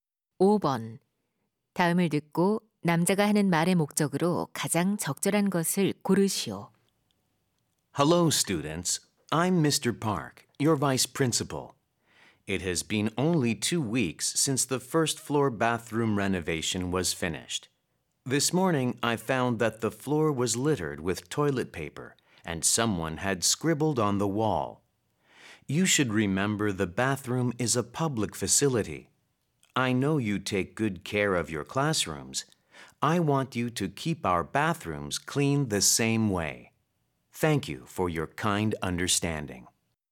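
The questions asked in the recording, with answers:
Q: 다음을 듣고 남자가 하는 말의 목적으로 가장 적절한 것을 고르시오.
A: 학교 화장실을 깨끗하게 사용할 것을 당부하려고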